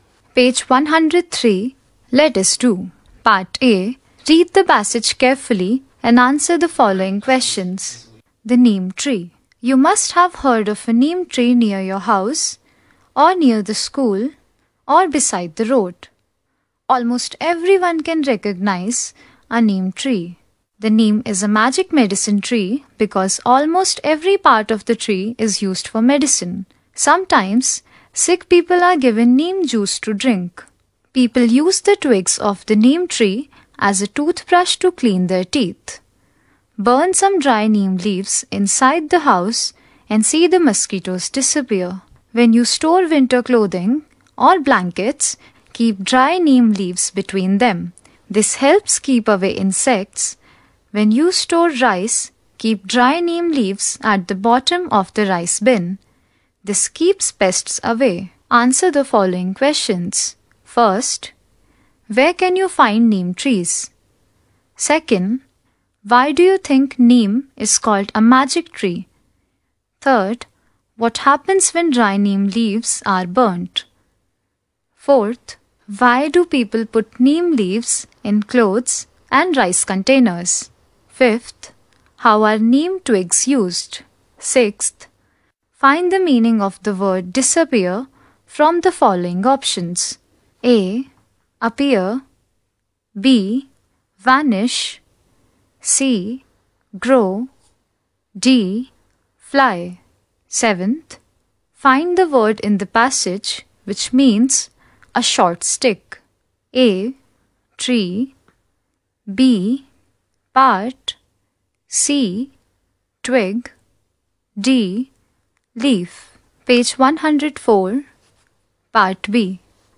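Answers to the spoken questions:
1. Near houses, schools or beside the road
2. Because almost every part of it is used for medicine
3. Mosquitoes disappear
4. To keep away insects and pests
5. As a toothbrush to clean teeth
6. B: Vanish.
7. C: Twig.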